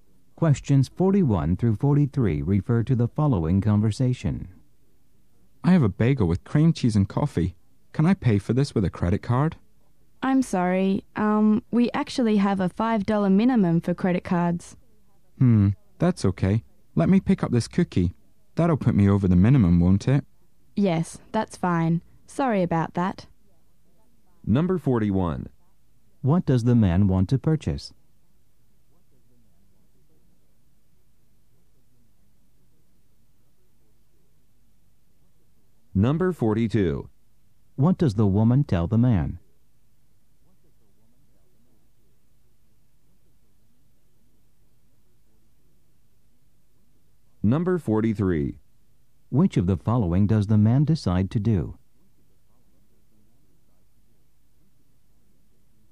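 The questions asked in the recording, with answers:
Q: What does the man want to purchase?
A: A bagel with cream cheese and coffee

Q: What does the woman tell the man?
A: There is a $5 minimum for credit cards

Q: Which of the following does the man decide to do?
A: Buy a cookie too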